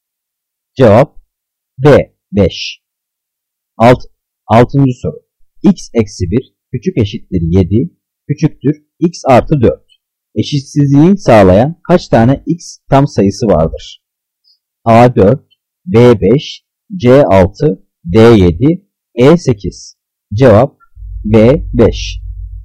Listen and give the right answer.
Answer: Cevap B 5.